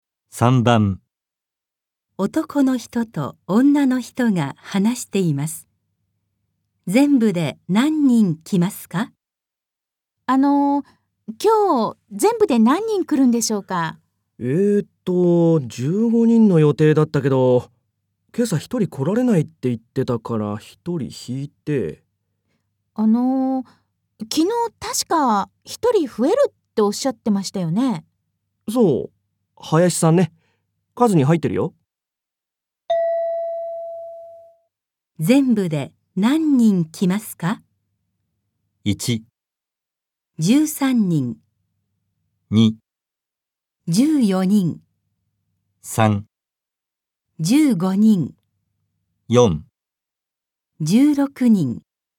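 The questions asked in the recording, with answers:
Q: 全部で何人来ますか?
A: 2: 14人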